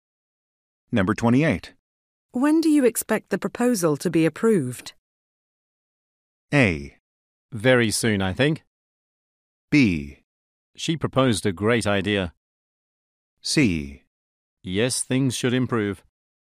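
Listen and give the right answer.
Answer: A: Very soon, I think.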